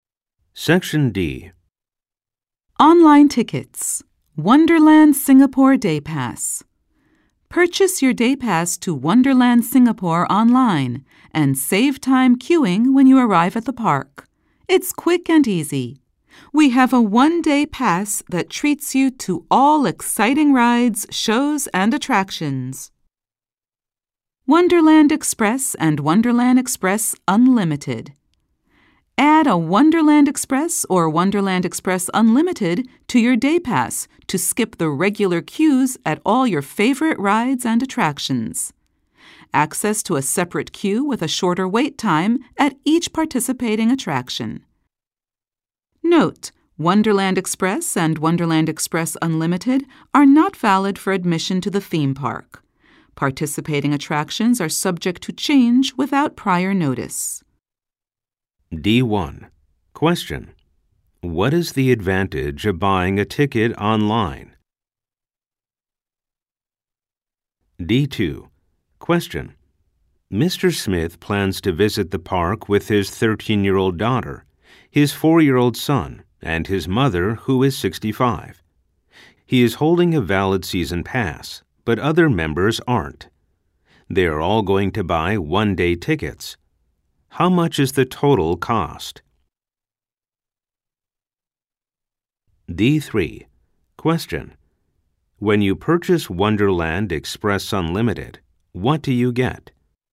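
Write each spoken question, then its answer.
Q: What is the advantage of buying a ticket online?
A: You save time queuing when you arrive at the park.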